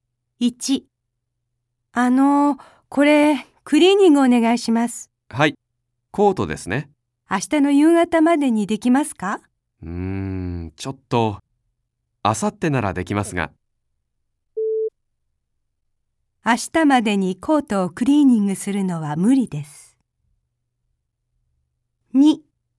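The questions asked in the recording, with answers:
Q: 明日までにコートをクリーニングするのは無理です。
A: 正しい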